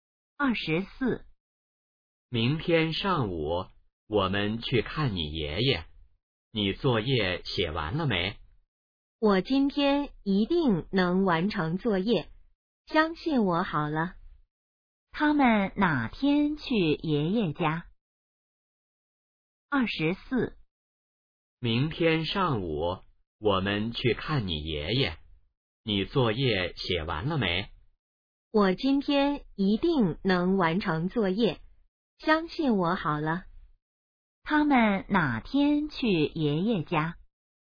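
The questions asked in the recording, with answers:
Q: 他们哪天去爷爷家?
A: 明天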